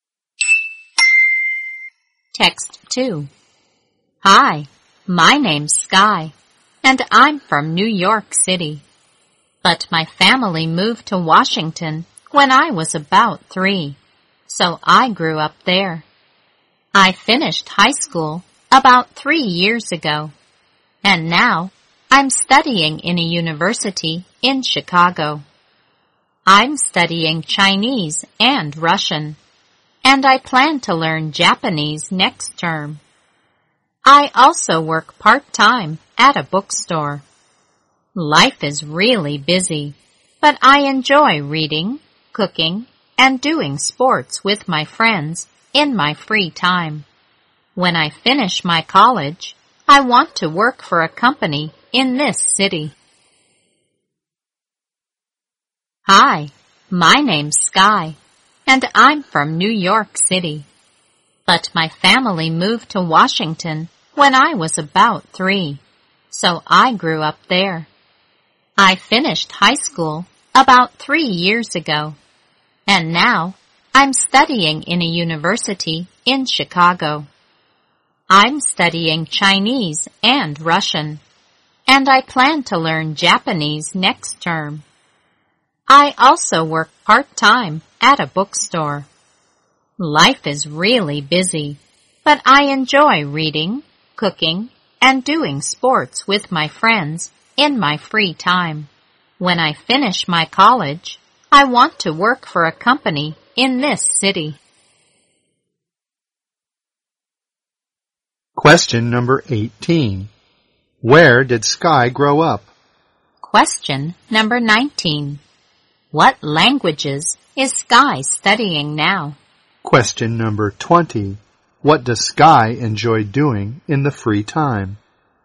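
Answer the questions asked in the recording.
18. In Washington
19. Chinese and Russian
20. Reading, cooking and doing sports with friends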